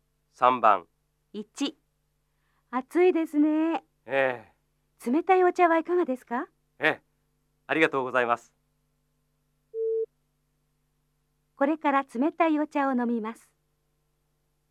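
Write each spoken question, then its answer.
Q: これから冷たいお茶を飲みます。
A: ○(正しい)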